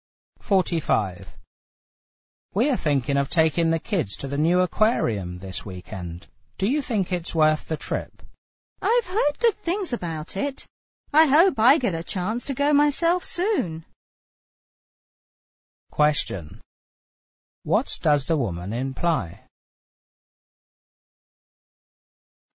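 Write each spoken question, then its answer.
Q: What does the woman imply?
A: She hasn't been to the aquarium herself.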